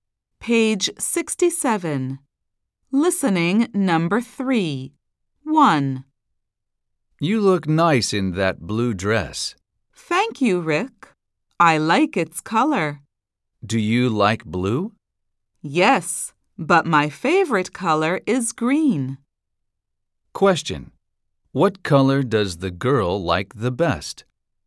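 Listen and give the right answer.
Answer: green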